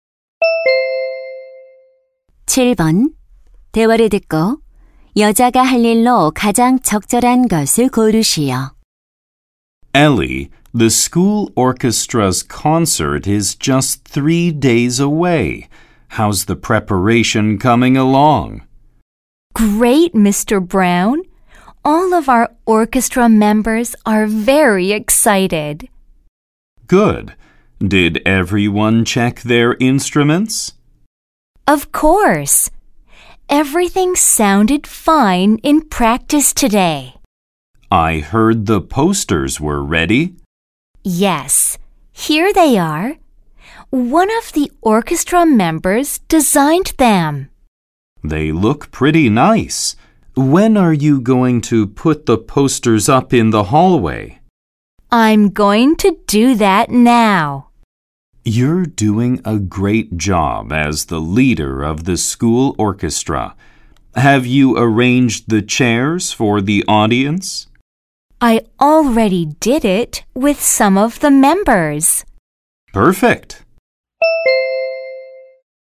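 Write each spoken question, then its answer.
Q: 대화를 듣고 여자가 할 일로 가장 적절한 것을 고르시오.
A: 복도에 포스터 붙이기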